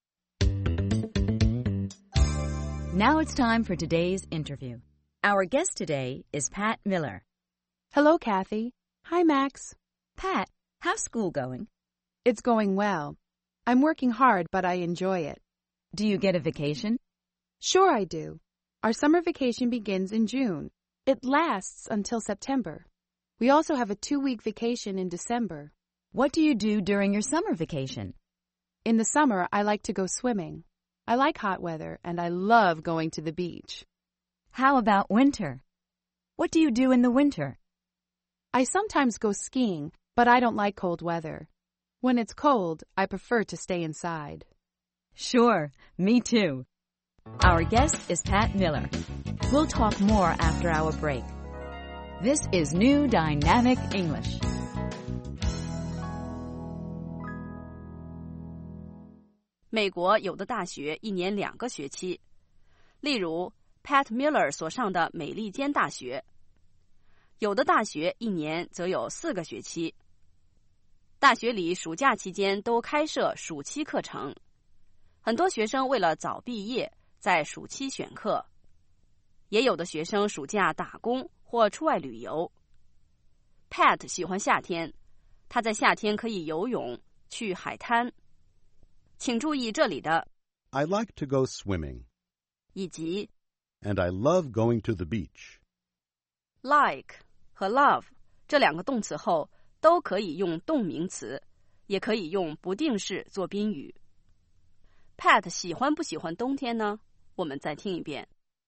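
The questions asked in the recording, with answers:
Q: Pat 喜欢不喜欢冬天呢?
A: 不太喜欢,他不喜欢冷天,有时去滑雪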